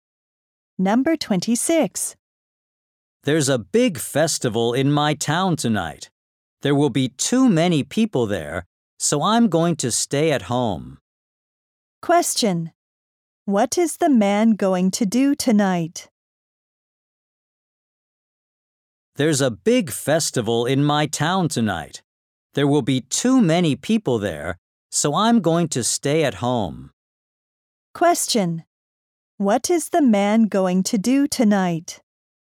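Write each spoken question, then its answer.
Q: What is the man going to do tonight?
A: Stay at home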